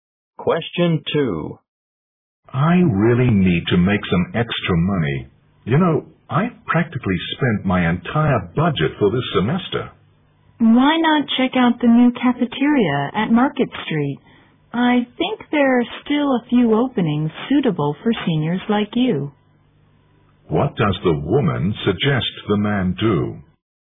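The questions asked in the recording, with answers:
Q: What does the woman suggest the man do?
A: Apply for a job at the new cafeteria on Market Street.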